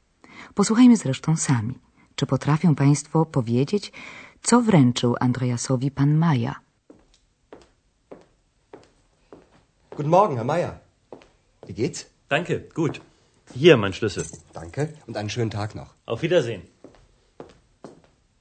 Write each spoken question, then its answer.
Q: czy potrafią Państwo powiedzieć, co wręczył Andreasowi pan Maja.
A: Pan Maja położył przed Andreasem swój klucz od pokoju